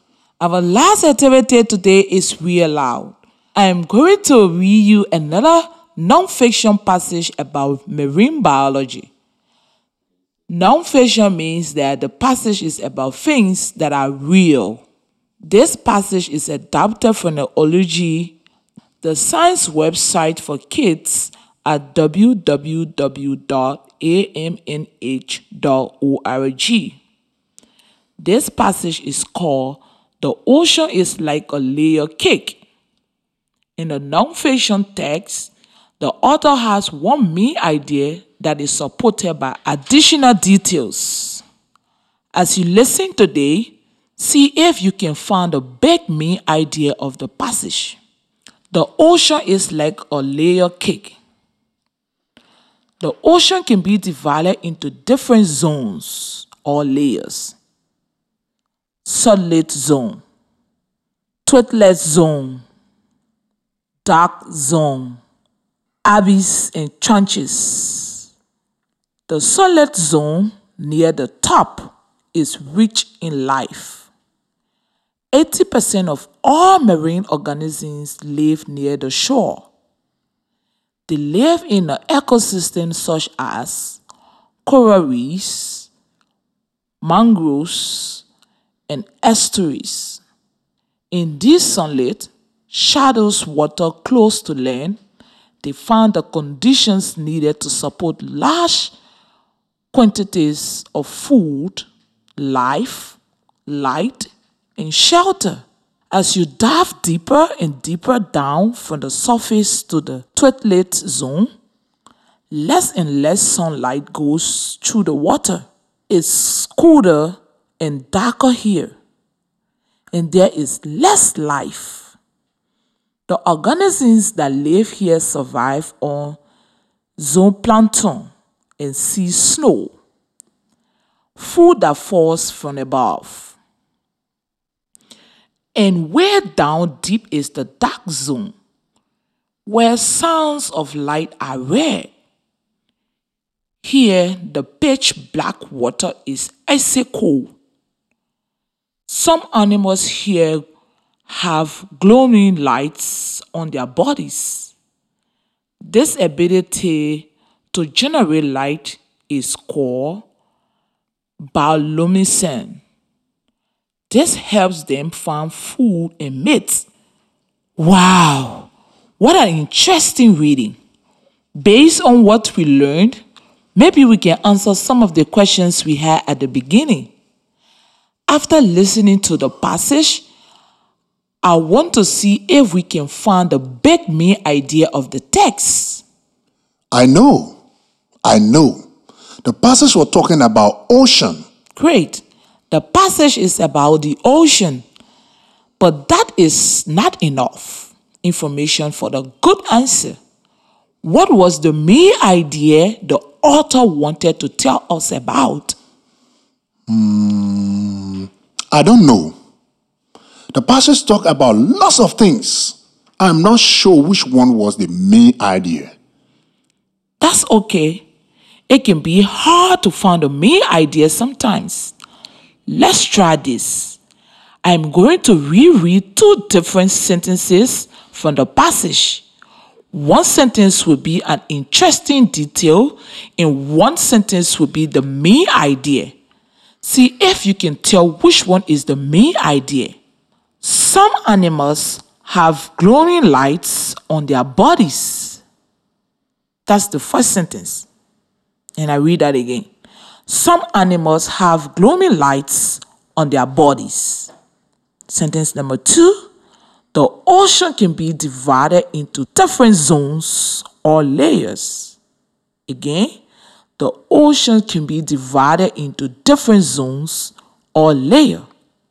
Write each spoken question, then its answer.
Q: See if you can tell which one is the main idea.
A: So I think sentence two, the ocean can be divided into different zones or layers.